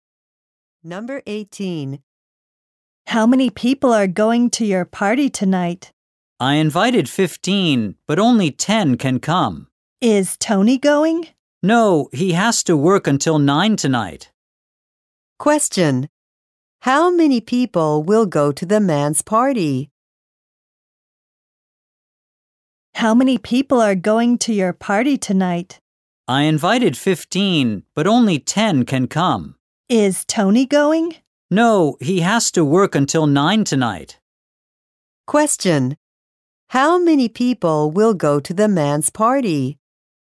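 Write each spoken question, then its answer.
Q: How many people will go to the man's party?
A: 10.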